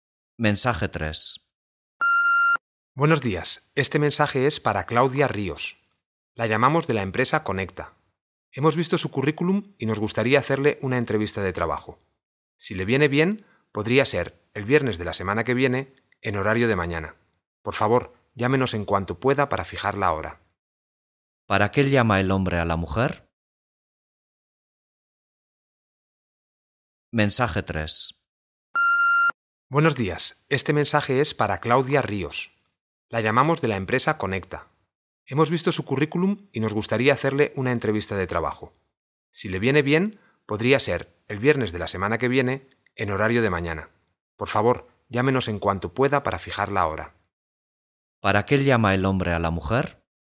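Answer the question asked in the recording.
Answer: Para ofrecerle una entrevista de trabajo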